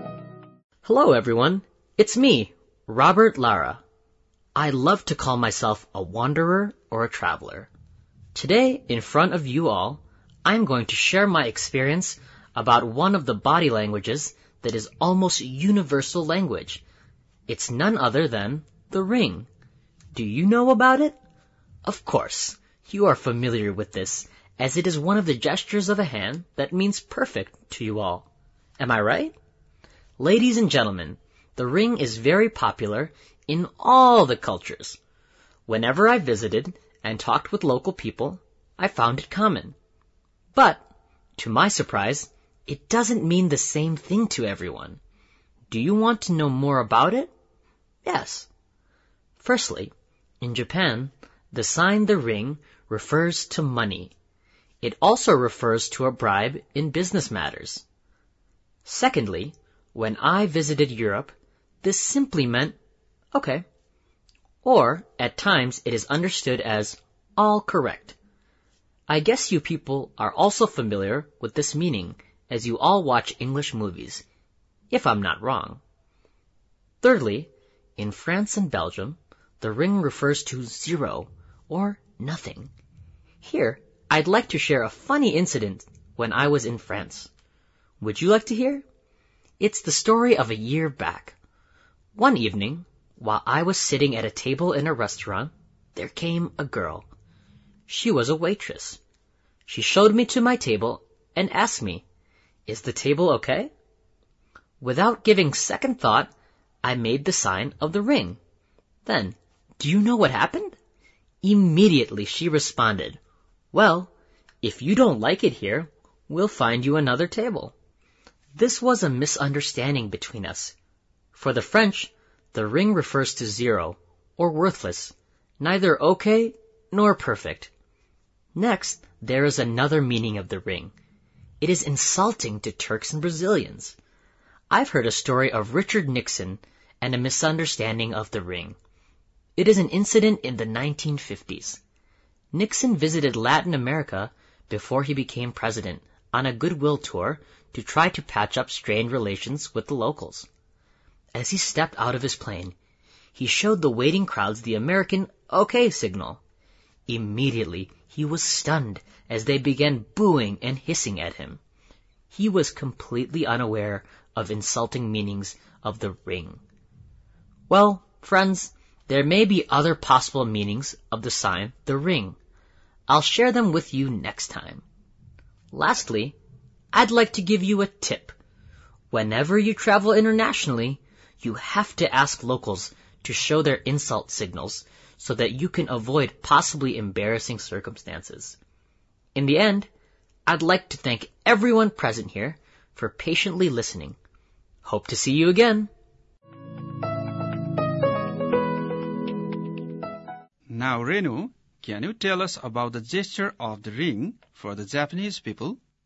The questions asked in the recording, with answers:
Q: Now, Renu, can you tell us about the gesture of the ring for the Japanese people?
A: For the Japanese people, the gesture of ring means money.